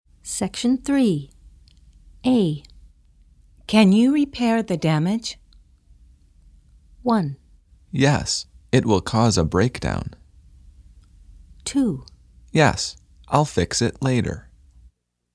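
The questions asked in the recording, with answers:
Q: Can you repair the damage?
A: 2: Yes, I'll fix it later.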